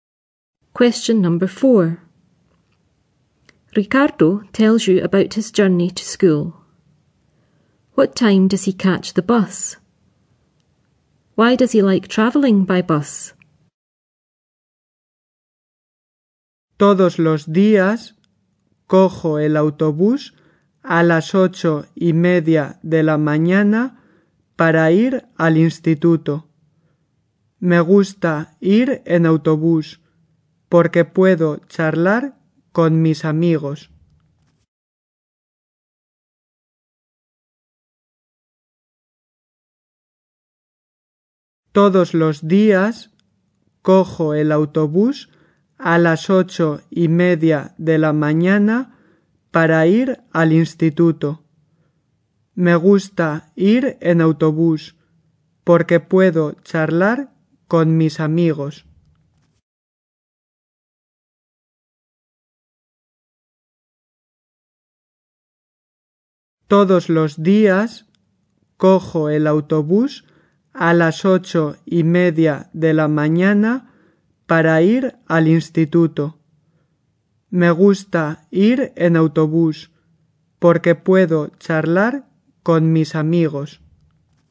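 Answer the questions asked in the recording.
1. 8:30 in the morning
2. He can chat with his friends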